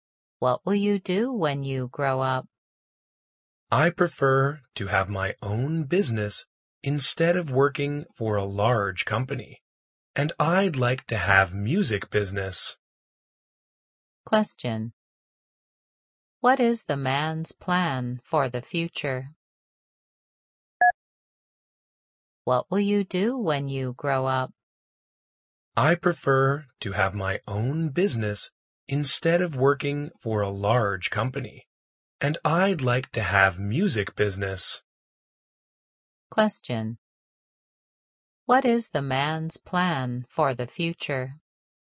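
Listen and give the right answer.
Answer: To have his own music business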